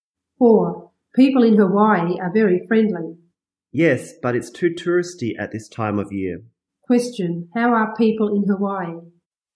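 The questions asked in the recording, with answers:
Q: How are people in Hawaii?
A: Very friendly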